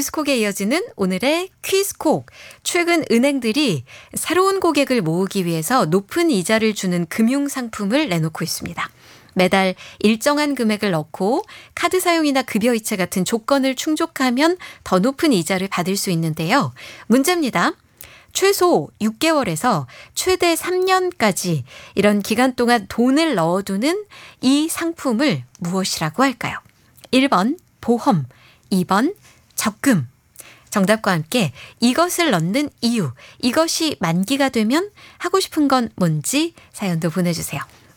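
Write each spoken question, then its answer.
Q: 최소 6개월에서 최대 3년까지 이런 기간 동안 돈을 넣어두는 이 상품을 무엇이라고 할까요?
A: 2: 적금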